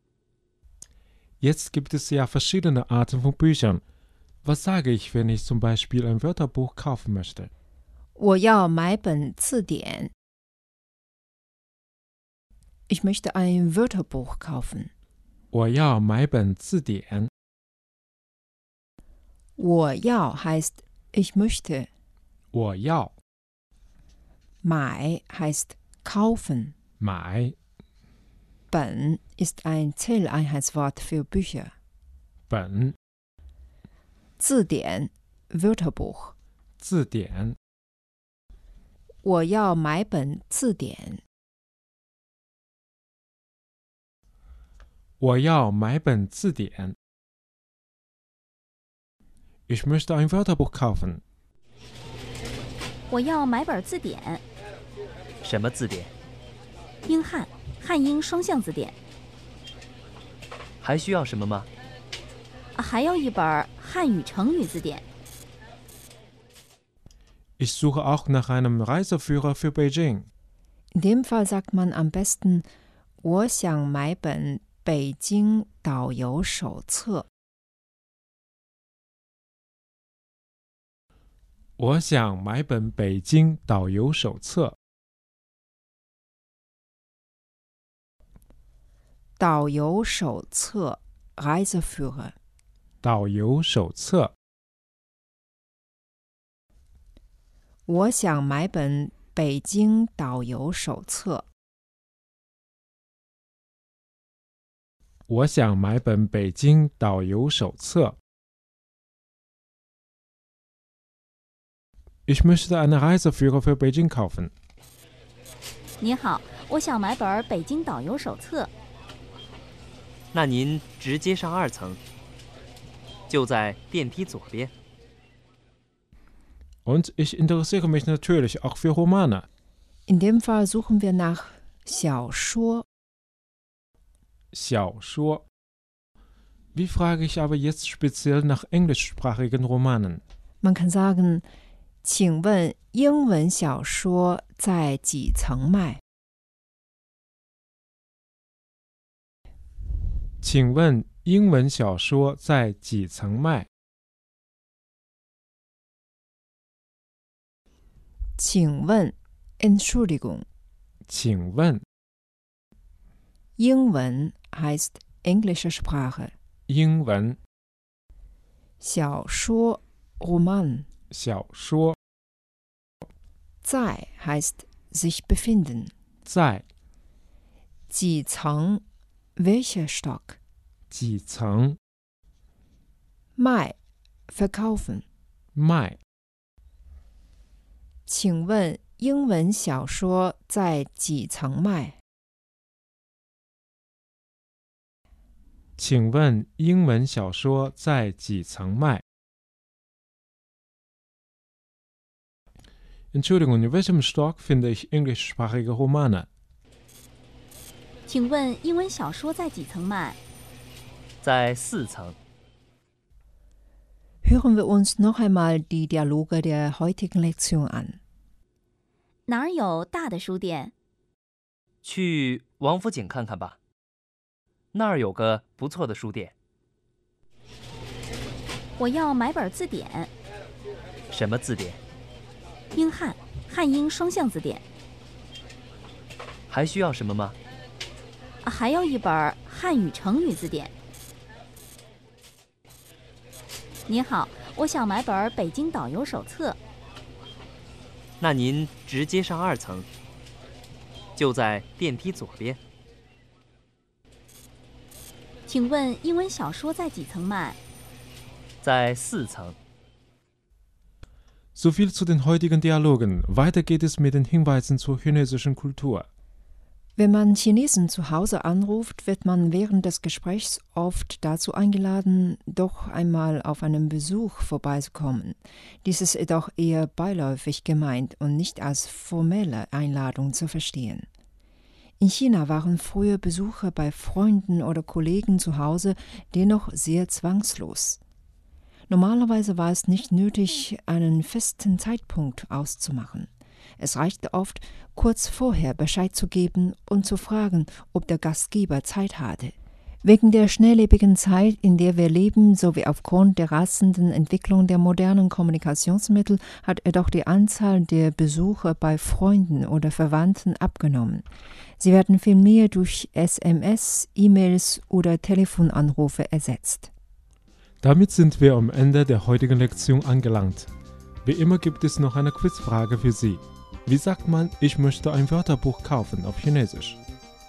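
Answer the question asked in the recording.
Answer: 我要买本字典 (Wo yao mai ben zidian)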